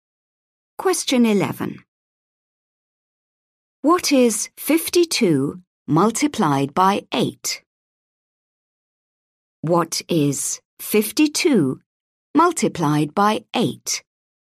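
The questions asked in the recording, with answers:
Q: What is 52 multiplied by 8?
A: 416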